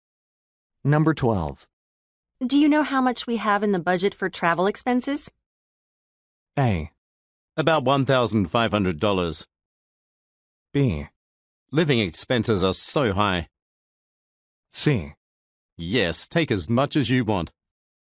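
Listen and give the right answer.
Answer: A: About $1,500.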